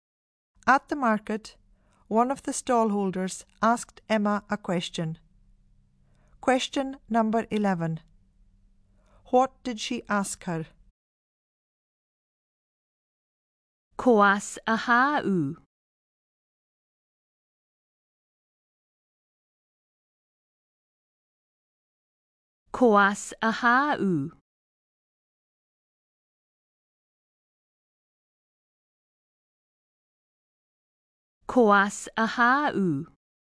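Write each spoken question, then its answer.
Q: What did she ask her?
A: Where are you from?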